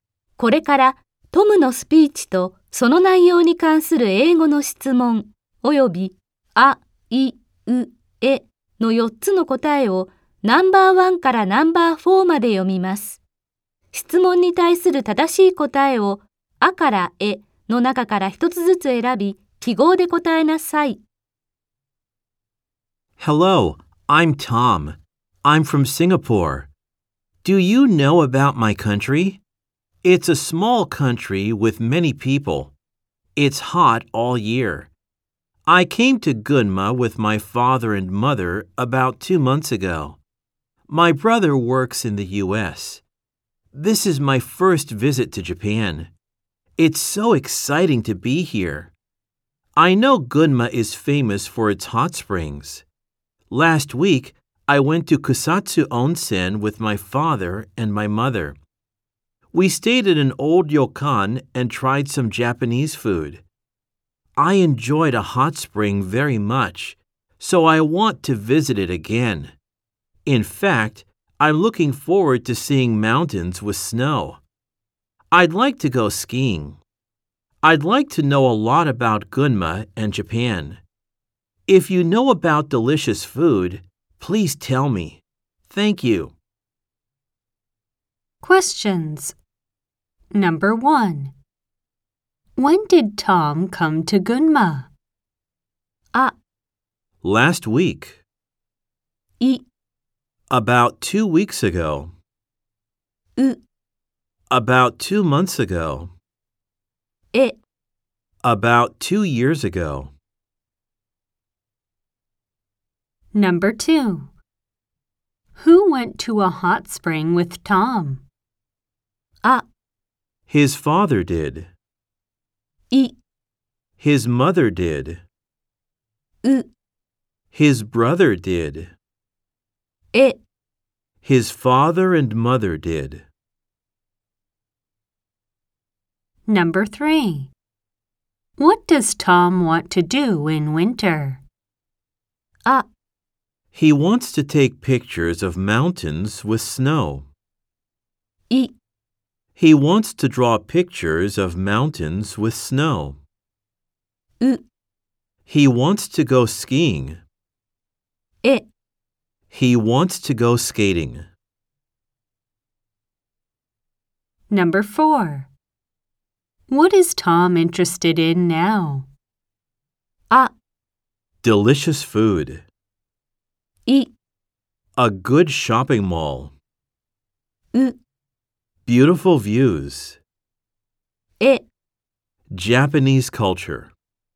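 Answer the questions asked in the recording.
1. う: About 2 months ago.
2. え: His father and mother did.
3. う: He wants to go skiing.
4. あ: Delicious food.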